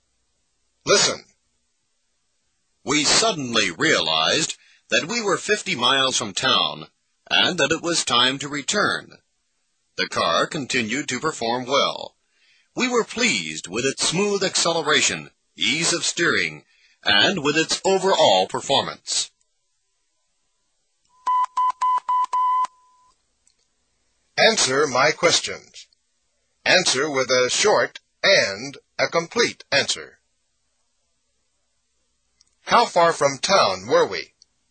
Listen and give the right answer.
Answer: 50 miles.